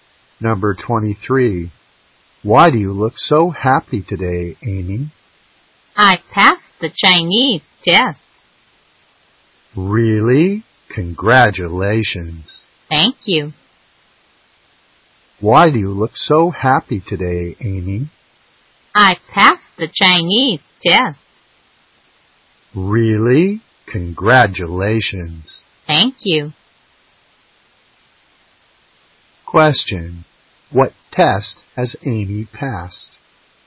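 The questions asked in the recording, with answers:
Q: What test has Amy passed?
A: The Chinese test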